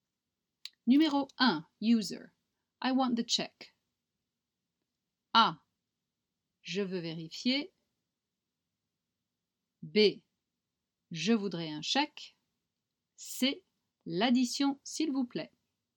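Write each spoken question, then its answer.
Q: I want the check.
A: C: L'addition, s'il vous plaît.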